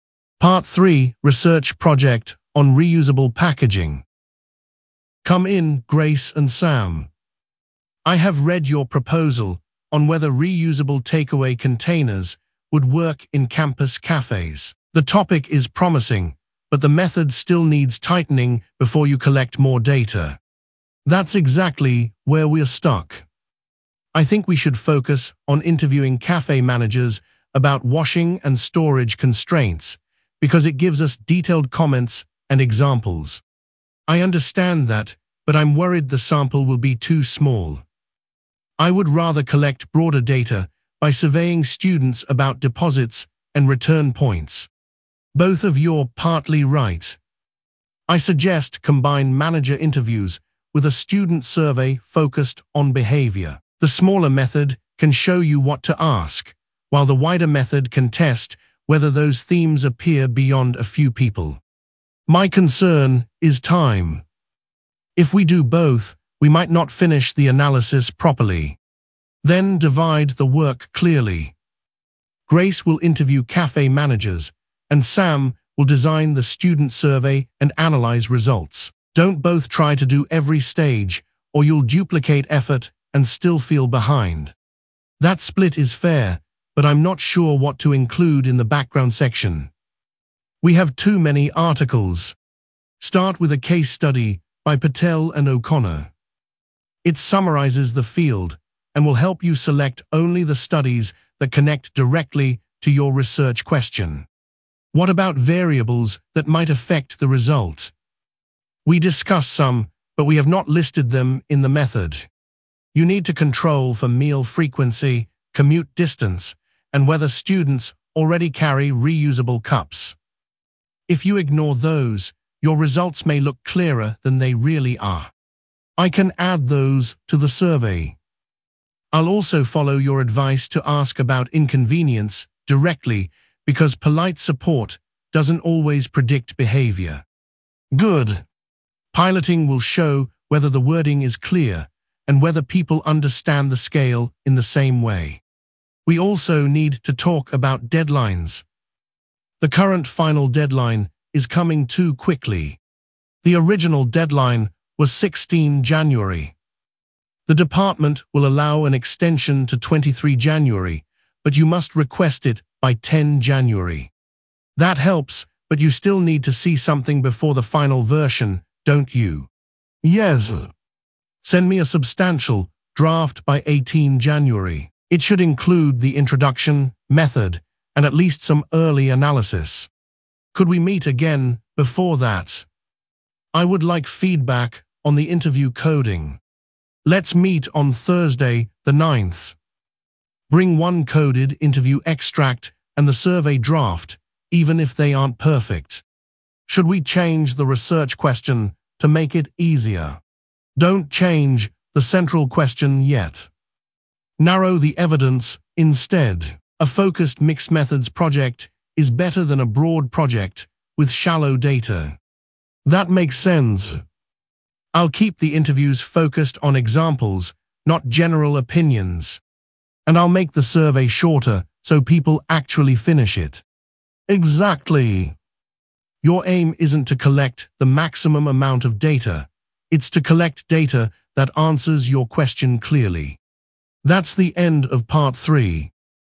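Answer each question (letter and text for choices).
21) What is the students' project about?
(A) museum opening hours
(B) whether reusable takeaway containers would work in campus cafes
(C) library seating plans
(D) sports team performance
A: (B) whether reusable takeaway containers would work in campus cafes

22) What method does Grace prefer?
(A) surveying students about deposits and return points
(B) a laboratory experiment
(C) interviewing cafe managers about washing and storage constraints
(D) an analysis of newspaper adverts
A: (C) interviewing cafe managers about washing and storage constraints

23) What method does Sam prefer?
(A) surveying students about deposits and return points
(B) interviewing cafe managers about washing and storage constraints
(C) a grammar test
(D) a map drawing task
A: (A) surveying students about deposits and return points

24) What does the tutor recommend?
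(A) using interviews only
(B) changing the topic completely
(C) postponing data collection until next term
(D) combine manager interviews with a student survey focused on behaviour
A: (D) combine manager interviews with a student survey focused on behaviour

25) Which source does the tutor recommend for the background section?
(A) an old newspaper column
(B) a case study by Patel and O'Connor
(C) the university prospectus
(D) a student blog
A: (B) a case study by Patel and O'Connor

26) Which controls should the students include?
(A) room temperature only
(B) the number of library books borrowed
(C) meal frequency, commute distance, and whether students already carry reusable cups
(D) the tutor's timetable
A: (C) meal frequency, commute distance, and whether students already carry reusable cups

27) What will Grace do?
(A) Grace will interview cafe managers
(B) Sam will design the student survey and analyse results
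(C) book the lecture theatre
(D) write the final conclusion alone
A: (A) Grace will interview cafe managers

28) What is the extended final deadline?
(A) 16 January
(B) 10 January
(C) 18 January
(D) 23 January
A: (D) 23 January

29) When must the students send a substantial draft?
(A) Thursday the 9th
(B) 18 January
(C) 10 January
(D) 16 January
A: (B) 18 January

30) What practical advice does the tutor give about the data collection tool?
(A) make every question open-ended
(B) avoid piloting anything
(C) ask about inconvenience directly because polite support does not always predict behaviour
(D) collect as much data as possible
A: (C) ask about inconvenience directly because polite support does not always predict behaviour

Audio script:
Part 3: Research Project on Reusable Packaging
Professor Lane: Come in, Grace and Sam. I have read your proposal on whether reusable takeaway containers would work in campus cafes. 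The topic is promising, but the method still needs tightening before you collect more data.
Grace: That is exactly where we are stuck. I think we should focus on interviewing cafe managers about washing and storage constraints because it gives us detailed comments and examples.
Sam: I understand that, but I am worried the sample will be too small. I would rather collect broader data by surveying students about deposits and return points.
Professor Lane: Both of you are partly right. I suggest combine manager interviews with a student survey focused on behaviour. The smaller method can show you what to ask, while the wider method can test whether those themes appear beyond a few people.
Grace: My concern is time. If we do both, we might not finish the analysis properly.
Professor Lane: Then divide the work clearly. Grace will interview cafe managers, and Sam will design the student survey and analyse results. 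Do not both try to do every stage, or you will duplicate effort and still feel behind.
Sam: That split is fair, but I am not sure what to include in the background section. We have too many articles.
Professor Lane: Start with a case study by Patel and O'Connor. It summarises the field and will help you select only the studies that connect directly to your research question.
Grace: What about variables that might affect the result? We discussed some, but we have not listed them in the method.
Professor Lane: You need to control for meal frequency, commute distance, and whether students already carry reusable cups. If you ignore those, your results may look clearer than they really are.
Sam: I can add those to the survey. I will also follow your advice to ask about inconvenience directly because polite support does not always predict behaviour.
Professor Lane: Good. Piloting will show whether the wording is clear and whether people understand the scale in the same way.
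Grace: We also need to talk about deadlines. The current final deadline is coming too quickly.
Professor Lane: The original deadline was 16 January. The department will allow an extension to 23 January, but you must request it by 10 January.
Sam: That helps, but you still need to see something before the final version, don't you?
Professor Lane: Yes. Send me a substantial draft by 18 January. It should include the introduction, method, and at least some early analysis.
Grace: Could we meet again before that? I would like feedback on the interview coding.
Professor Lane: Let's meet on Thursday the 9th. Bring one coded interview extract and the survey draft, even if they are not perfect.
Sam: Should we change the research question to make it easier?
Professor Lane: Do not change the central question yet. Narrow the evidence instead. A focused mixed-methods project is better than a broad project with shallow data.
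Grace: That makes sense. I will keep the interviews focused on examples, not general opinions.
Sam: And I will make the survey shorter so people actually finish it.
Professor Lane: Exactly. Your aim is not to collect the maximum amount of data; it is to collect data that answers your question clearly.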